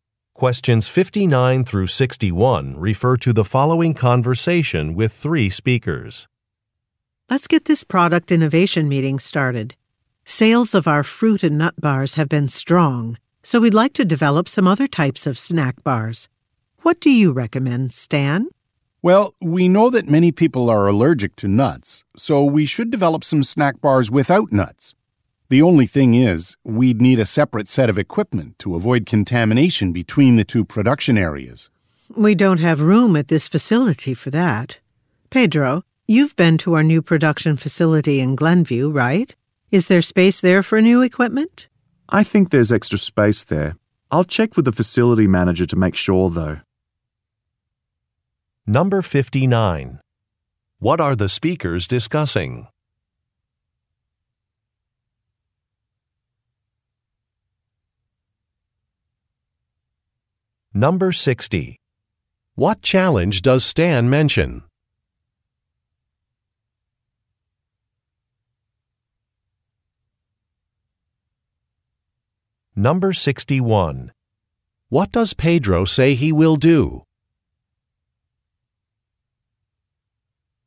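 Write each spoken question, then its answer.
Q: What are the speakers discussing?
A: Developing new snack bars

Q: What challenge does Stan mention?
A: They need separate equipment and lack space

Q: What does Pedro say he will do?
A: Check with the facility manager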